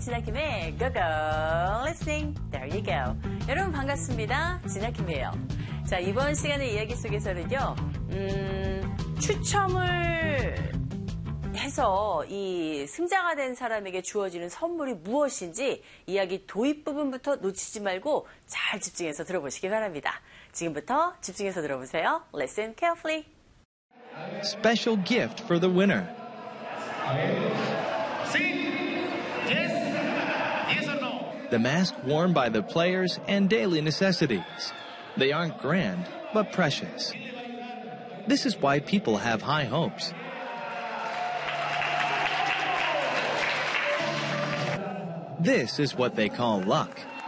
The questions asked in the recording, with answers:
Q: 추첨을 해서 이 승자가 된 사람에게 주어지는 선물이 무엇인지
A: 자, 바로 이 선수들이 착용했던 가면과 그리고 생활 필수품이었죠.